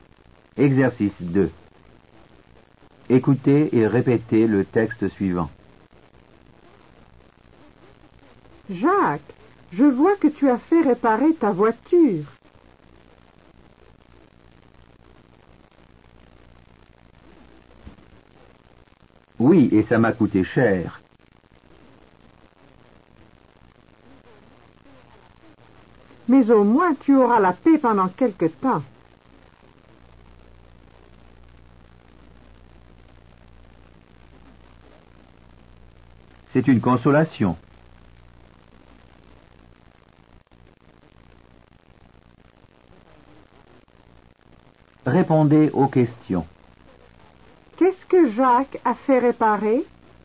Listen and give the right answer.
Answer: Il a fait réparer sa voiture.